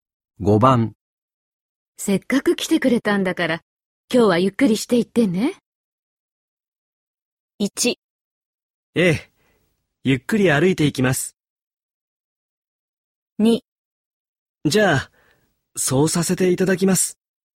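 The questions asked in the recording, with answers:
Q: せっかく来てくれたんだから、今日はゆっくりしていってね。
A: 2: じゃあ、そうさせていただきます。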